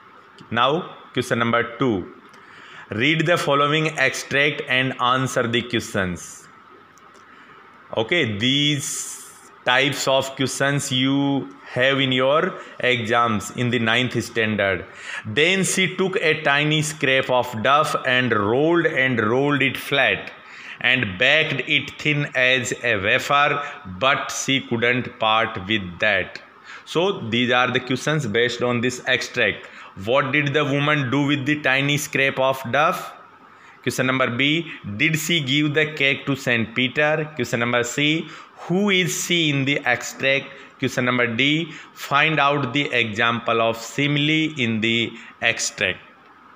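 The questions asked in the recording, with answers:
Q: What did the woman do with the tiny scrap of duff?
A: She rolled it flat and baked it thin as a wafer

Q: Did she give the cake to Saint Peter?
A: No, she couldn't part with it

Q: Find out the example of simile in the extract.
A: thin as a wafer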